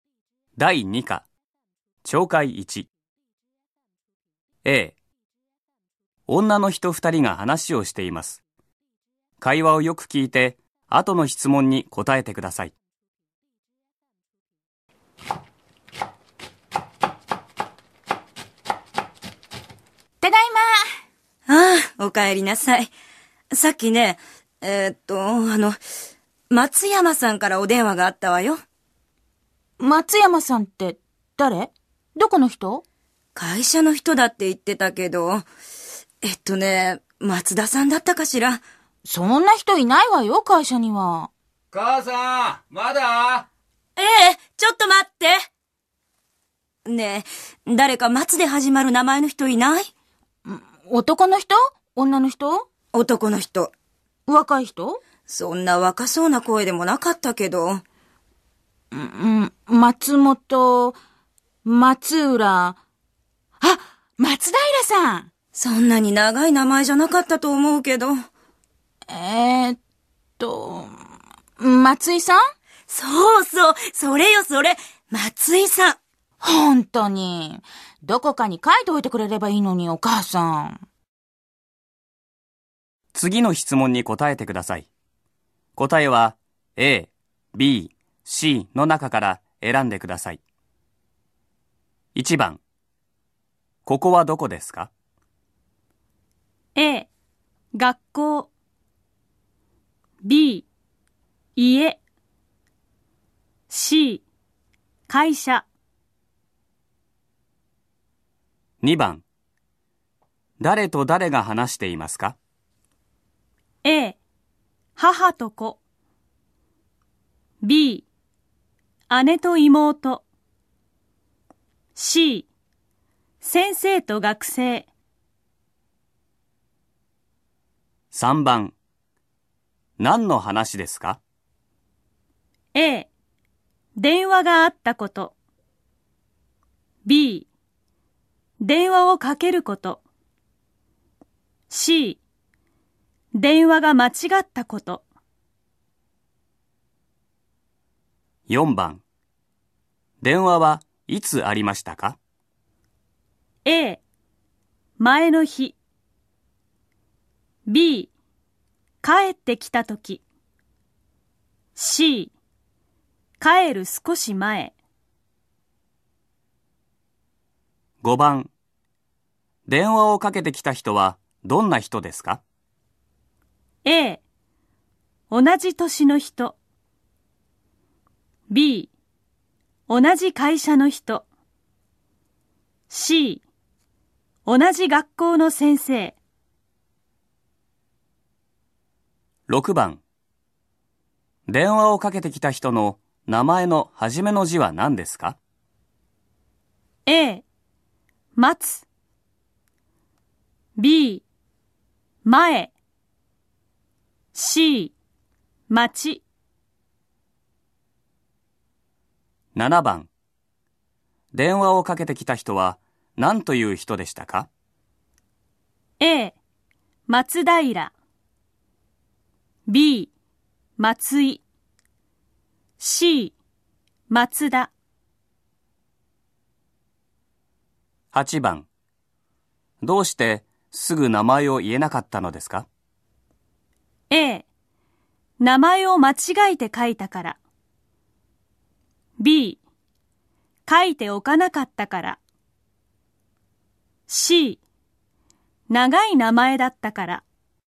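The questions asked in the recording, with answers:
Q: ここはどこですか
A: B: 家

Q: 誰と誰が話していますか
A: A: 母と子

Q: 何の話ですか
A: A: 電話があったこと

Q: 電話はいつありましたか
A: C: 帰る少し前

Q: 電話をかけてきた人はどんな人ですか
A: B: 同じ会社の人

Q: 電話をかけてきた人は何という人でしたか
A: B: 松井

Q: どうしてすぐ名前を言えなかったのですか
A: B: 書いておかなかったから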